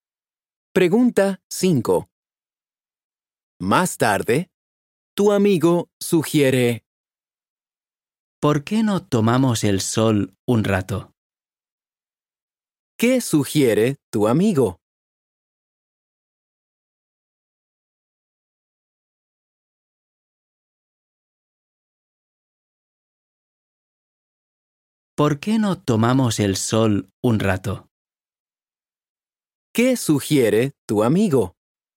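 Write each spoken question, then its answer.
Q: ¿Qué sugiere tu amigo?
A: Tomar el sol un rato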